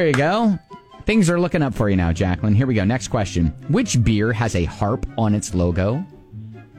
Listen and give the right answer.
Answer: Yes, it is Guinness.